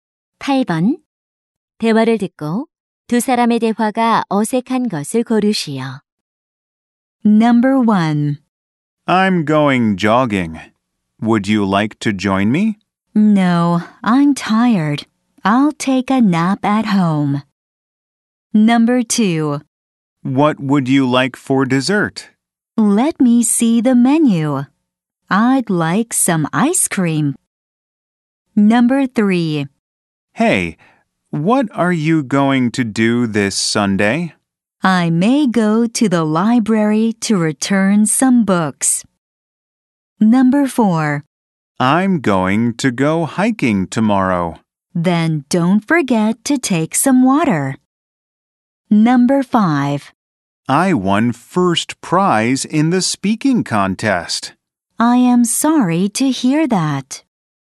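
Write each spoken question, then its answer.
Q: 대화를 듣고 두 사람의 대화가 어색한 것을 고르시오.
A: 5: I won first prize in the speaking contest. / I am sorry to hear that.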